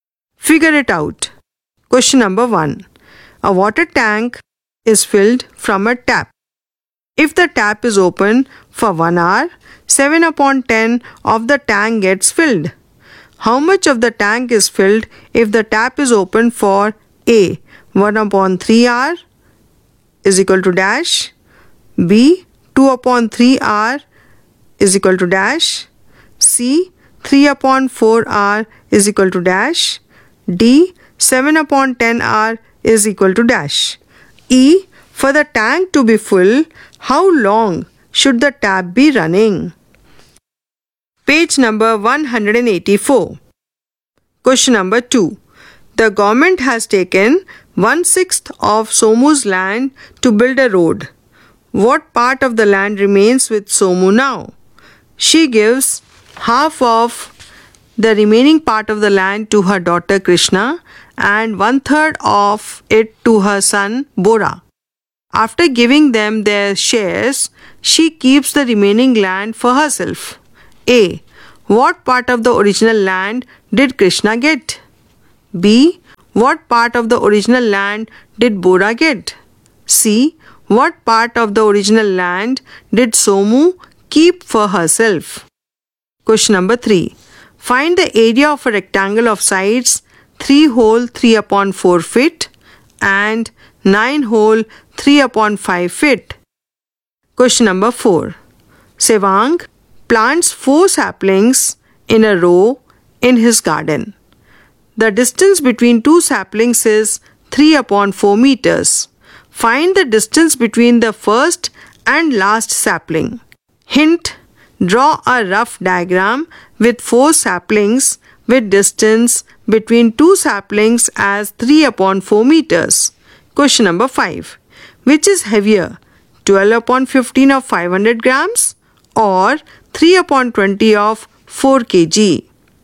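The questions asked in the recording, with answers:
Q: E, for the tank to be full, how long should the tap be running?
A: 10/7 hours

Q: What part of the land remains with Somu now?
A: 5/6

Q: A. What part of the original land did Krishna get?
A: 5/12

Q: B. What part of the original land did Bora get?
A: 5/18

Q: C. What part of the original land did Somu keep for herself?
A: 5/36

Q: Question number 3. Find the area of a rectangle of sides 3 whole 3 upon 4 feet and 9 whole 3/5 feet.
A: 36 square feet

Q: Find the distance between the first and last sapling.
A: 9/4 meters

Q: Question number 5. Which is heavier, 12/15 of 500 grams or 3/20 of 4 kg?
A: 3/20 of 4 kg (600 g vs 400 g)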